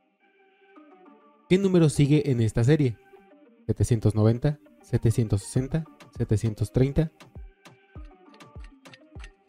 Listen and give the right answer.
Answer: 700?